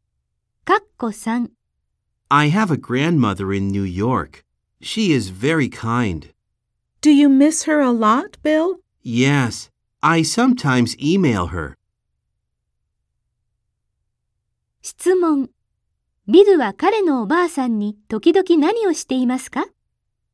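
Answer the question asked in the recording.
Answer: メールを送っている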